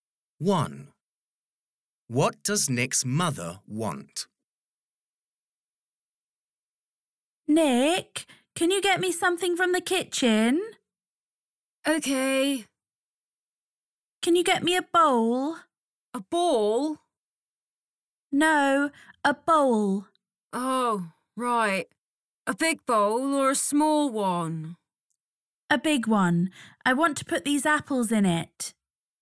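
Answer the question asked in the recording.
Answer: a big bowl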